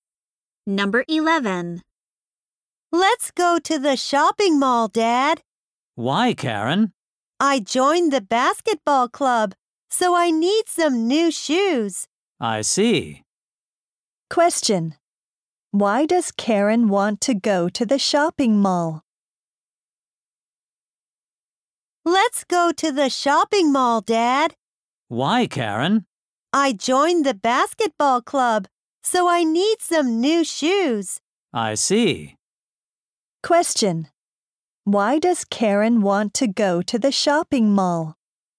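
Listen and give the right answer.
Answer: To buy new shoes for the basketball club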